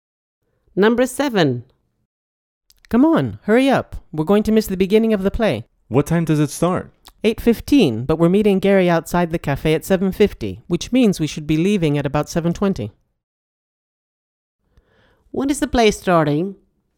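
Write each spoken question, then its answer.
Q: When is the play starting?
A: 8:15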